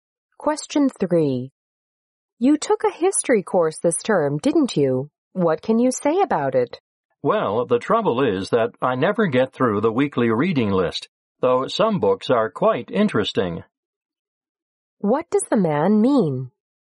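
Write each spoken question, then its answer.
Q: What does the man mean?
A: He can never finish the weekly reading list, which is too heavy.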